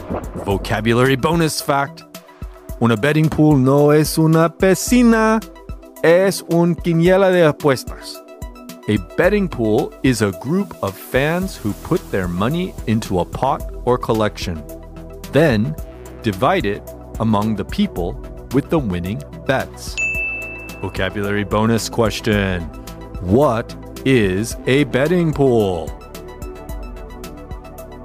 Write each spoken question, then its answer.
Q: What is a betting pool?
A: A betting pool is a group of fans who put their money into a pot or collection then divide it among the people with the winning bets.